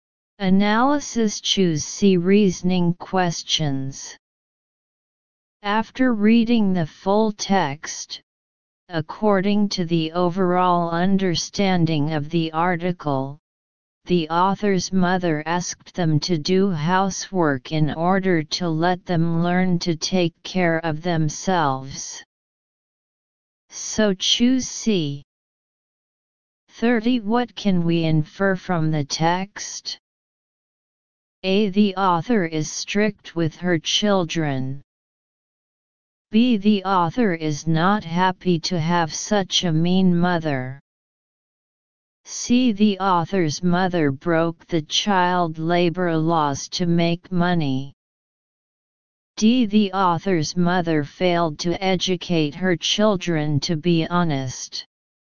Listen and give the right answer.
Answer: Analysis. Choose A.